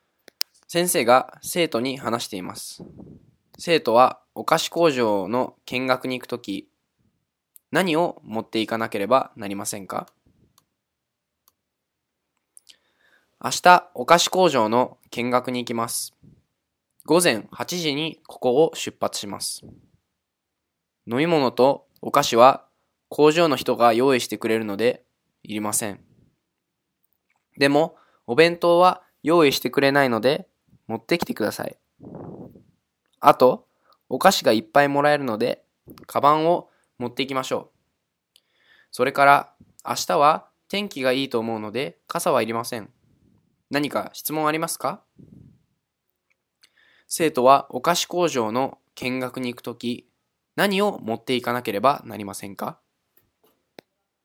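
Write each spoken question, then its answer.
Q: 生徒はお菓子工場の見学に行くとき、何を持っていかなければなりませんか?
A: お弁当とカバン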